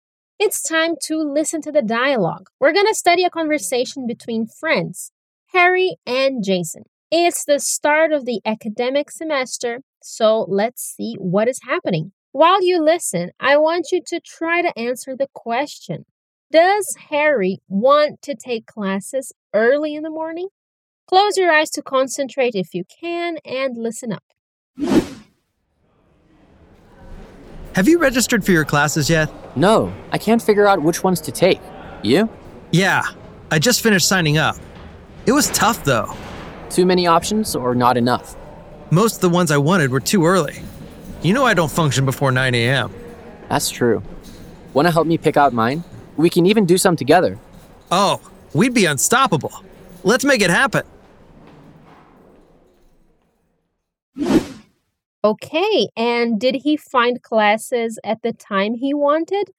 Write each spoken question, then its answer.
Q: Does Harry want to take classes early in the morning?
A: so he can't take early classes